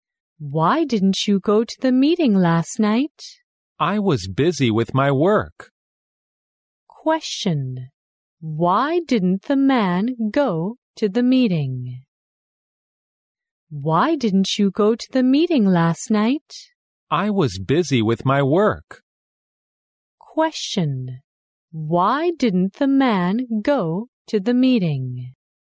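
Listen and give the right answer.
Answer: He was busy with his work.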